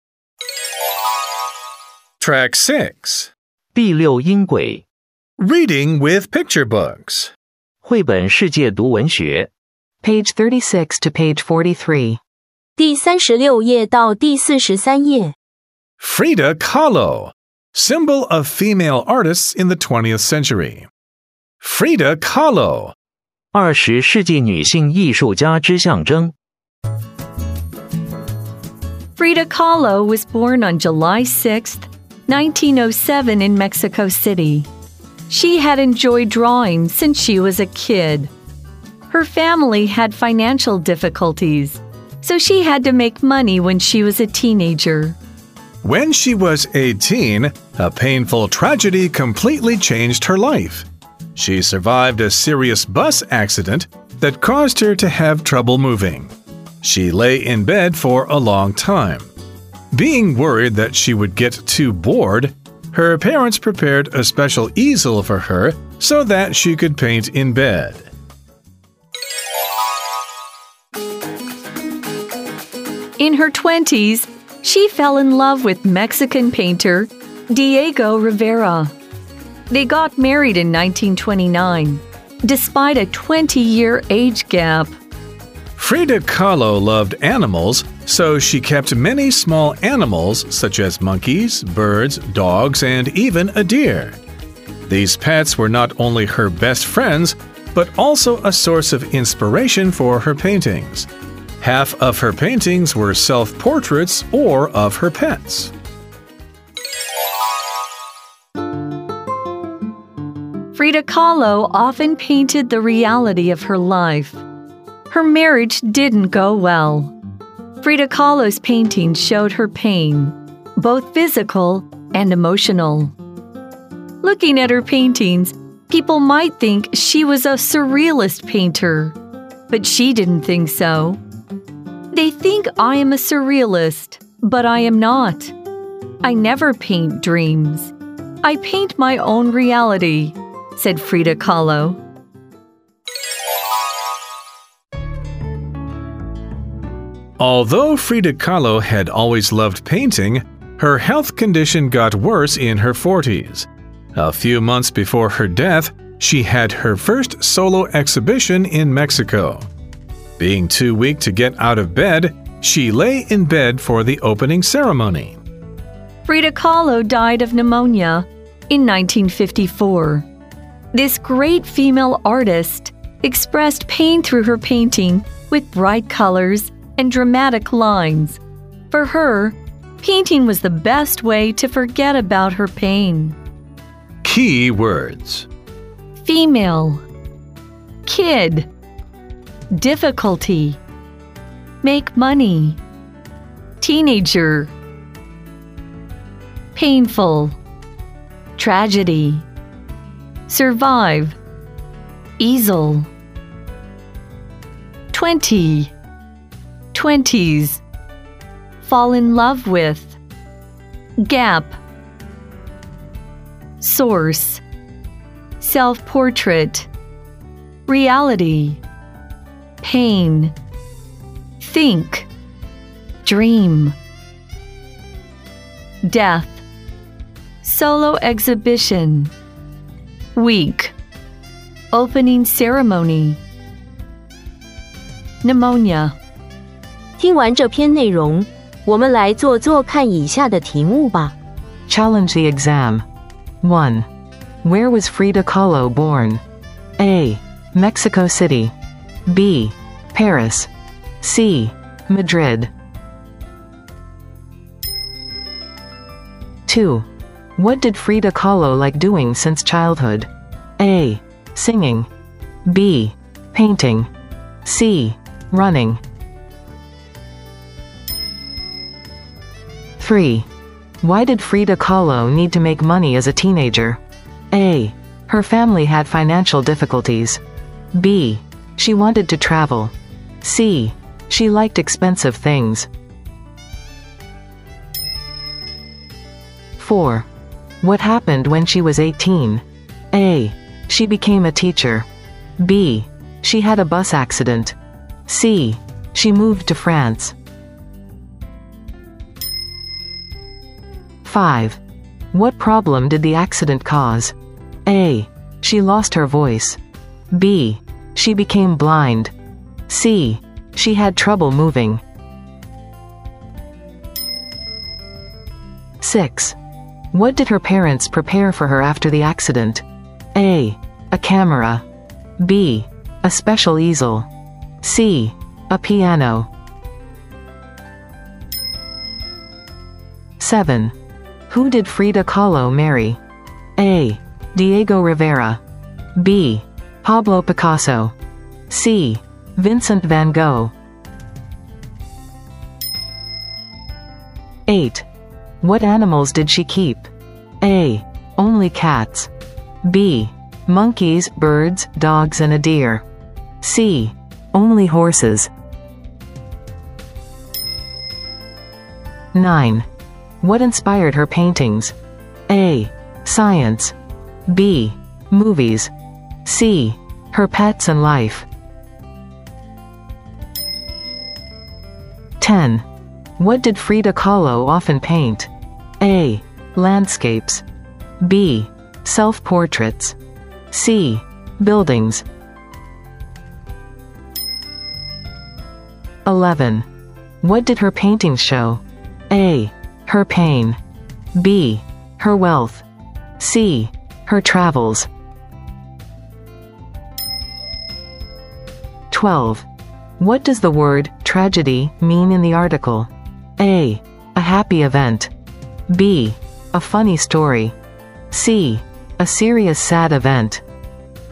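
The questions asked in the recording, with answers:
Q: Where was Frida Kahlo born?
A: A: Mexico City.

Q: What did Frida Kahlo like doing since childhood?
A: B: Painting.

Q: Why did Frida Kahlo need to make money as a teenager?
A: A: Her family had financial difficulties.

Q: What happened when she was 18?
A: B: She had a bus accident.

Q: What problem did the accident cause?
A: C: She had trouble moving.

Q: What did her parents prepare for her after the accident?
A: B: A special easel.

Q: Who did Frida Kahlo marry?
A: A: Diego Rivera.

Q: What animals did she keep?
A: B: Monkeys, birds, dogs, and a deer.

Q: What inspired her paintings?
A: C: Her pets and life.

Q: What did Frida Kahlo often paint?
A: B: Self-portraits.

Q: What did her paintings show?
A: A: Her pain.

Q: What does the word tragedy mean in the article?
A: C: A serious sad event.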